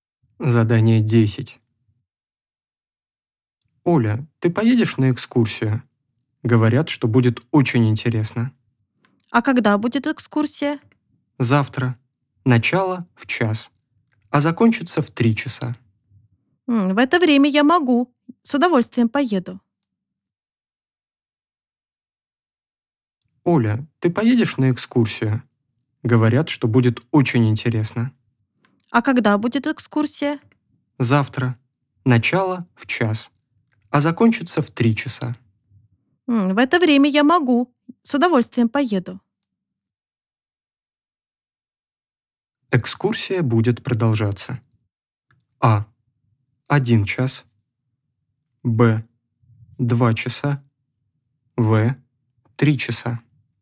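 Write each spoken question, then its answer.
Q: Экскурсия будет продолжаться.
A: Б: 2:00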